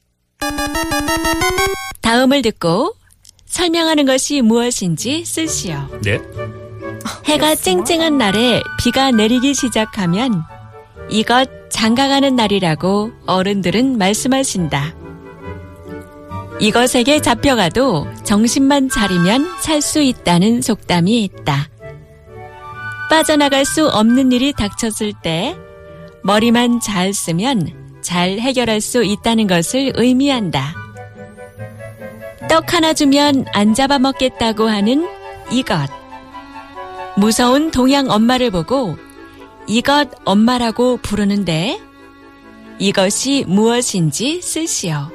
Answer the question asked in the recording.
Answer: Ahorangi.